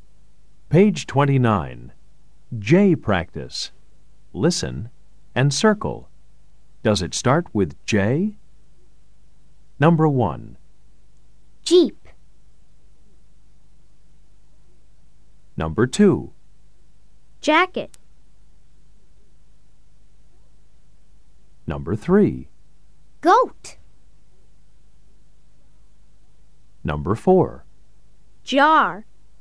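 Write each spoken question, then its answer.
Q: Jacket.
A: Yes

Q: Goat.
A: No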